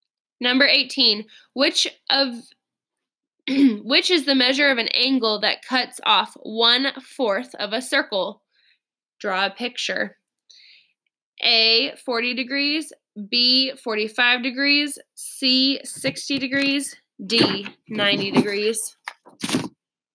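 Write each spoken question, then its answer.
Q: which is the measure of an angle that cuts off one fourth of a circle?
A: D: 90 degrees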